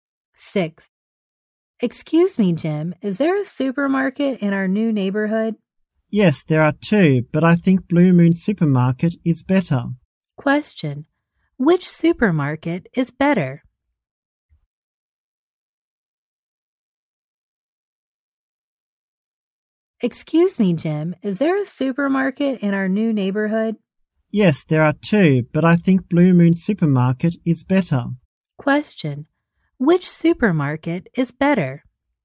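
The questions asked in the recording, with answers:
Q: Which supermarket is better?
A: Blue Moon Supermarket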